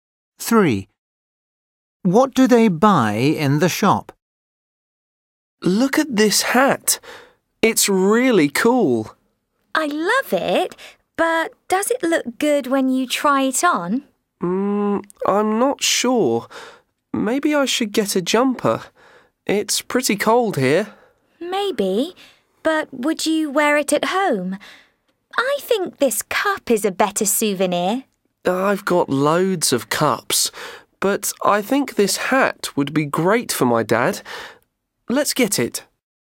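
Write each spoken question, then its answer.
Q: What do they buy in the shop?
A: a hat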